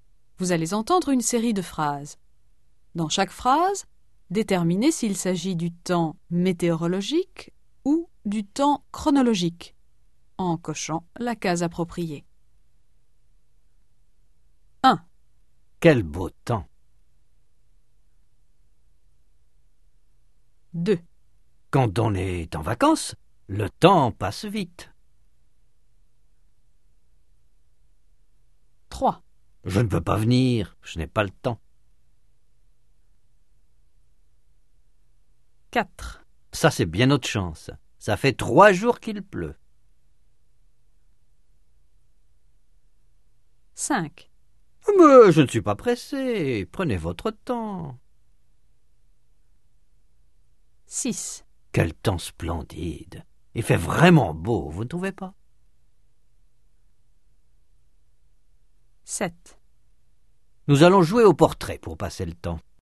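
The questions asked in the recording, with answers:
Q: Quel beau temps!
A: temps météorologique

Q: Quand on est en vacances, le temps passe vite.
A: temps chronologique

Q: Je ne peux pas venir, je n'ai pas le temps.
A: temps chronologique

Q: Ça, c'est bien notre chance. Ça fait 3 jours qu'il pleut.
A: temps météorologique

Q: Mais je ne suis pas pressé. Prenez votre temps.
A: temps chronologique

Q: Quel temps splendide. Il fait vraiment beau, vous ne trouvez pas?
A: temps météorologique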